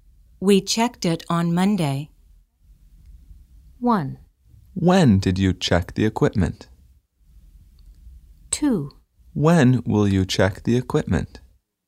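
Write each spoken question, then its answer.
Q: We checked it on Monday.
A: 1: When did you check the equipment?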